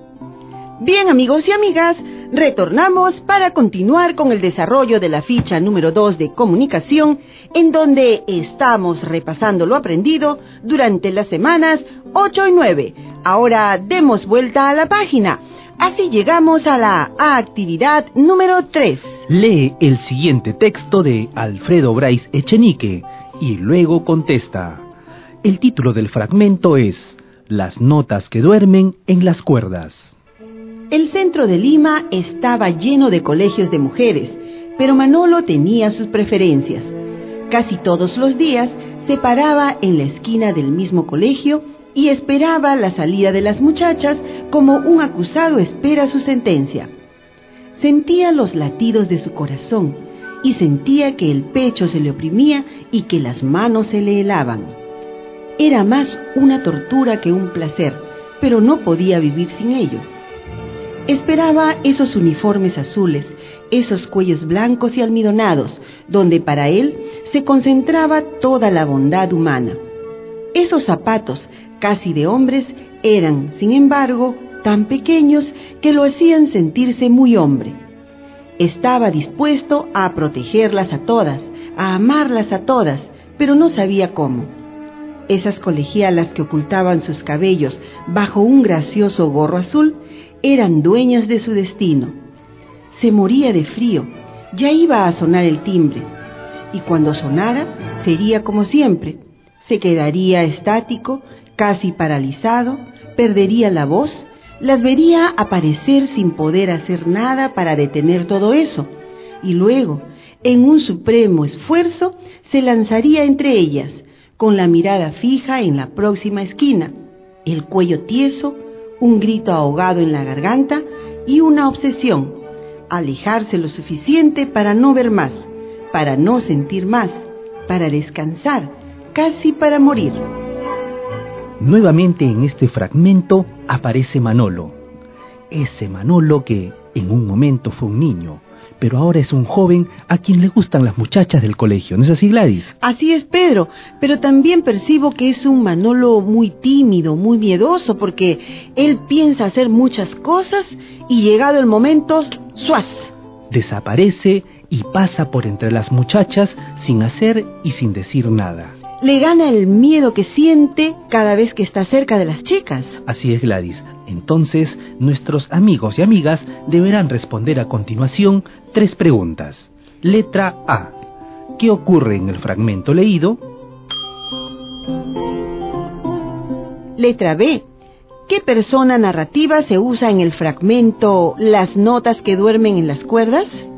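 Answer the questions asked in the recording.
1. Manolo espera casi todos los días la salida de las colegialas, pero por timidez y miedo pasa entre ellas sin hacer ni decir nada.
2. Tercera persona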